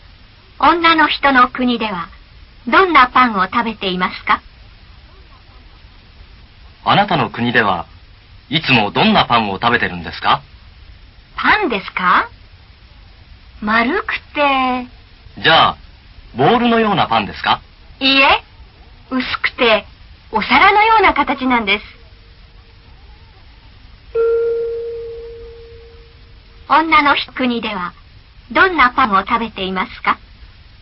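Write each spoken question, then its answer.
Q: 女の国ではどんなパンを食べていますか?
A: 丸くて薄い、お皿のような形のパン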